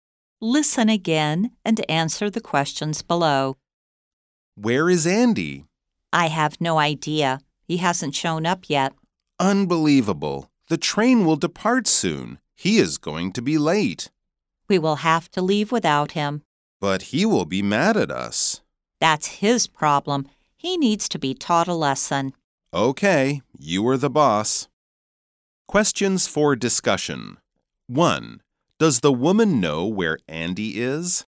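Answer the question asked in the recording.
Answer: No, she has no idea.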